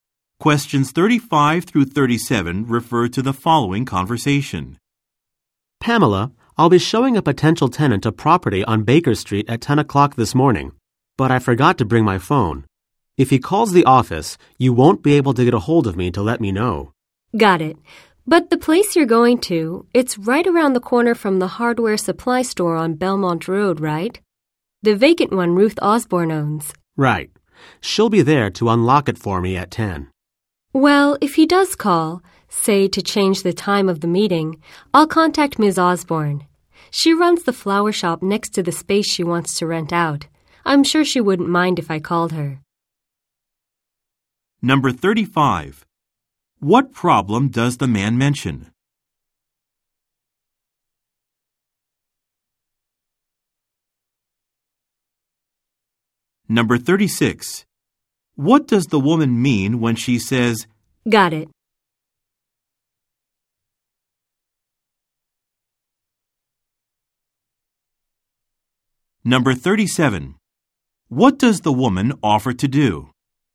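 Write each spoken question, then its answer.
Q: What problem does the man mention?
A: He forgot to bring his phone.

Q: What does the woman offer to do?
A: Contact Ms. Osborne (the property owner) if the tenant calls.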